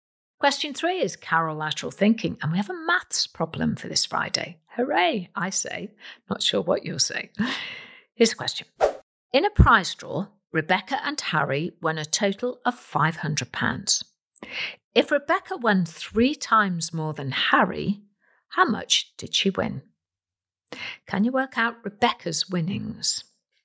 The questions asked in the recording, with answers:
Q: If Rebecca won three times more than Harry, how much did she win?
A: And the answer is £375.